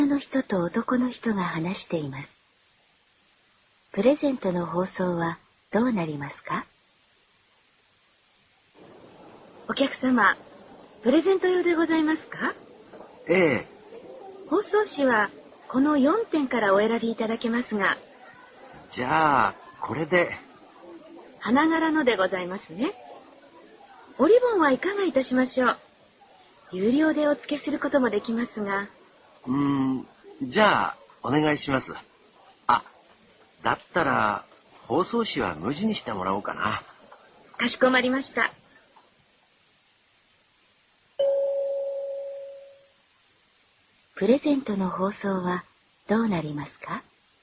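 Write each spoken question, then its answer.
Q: プレゼントの包装はどうなりますか?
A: 無地の包装紙にリボンを付ける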